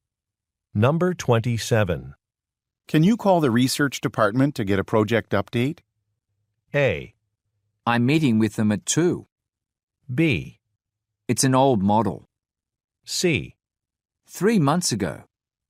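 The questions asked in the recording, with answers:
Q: Can you call the research department to get a project update?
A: A: I'm meeting with them at 2.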